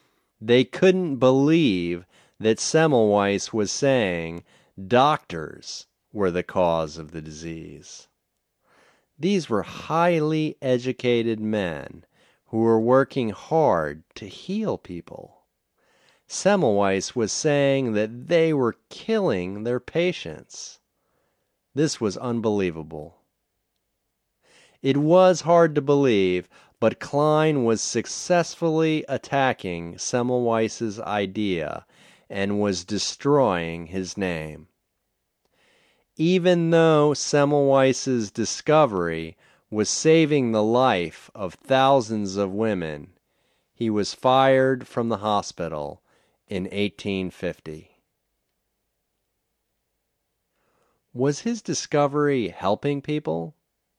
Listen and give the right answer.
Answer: Yes, his discovery was saving the lives of thousands of people.